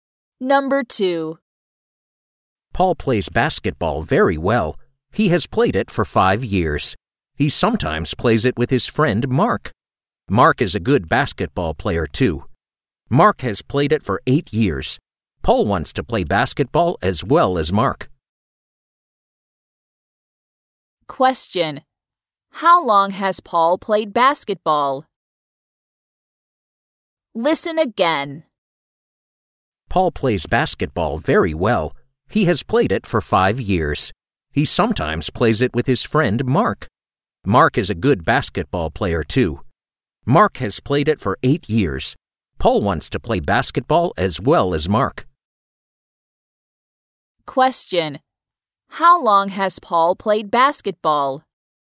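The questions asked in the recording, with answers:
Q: How long has Paul played basketball?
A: For 5 years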